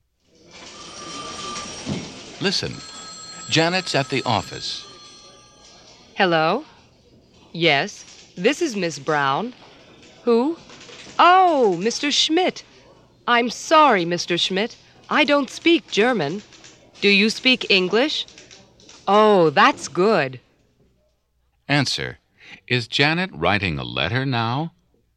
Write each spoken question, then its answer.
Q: Is Janet writing a letter now?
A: No, she's not.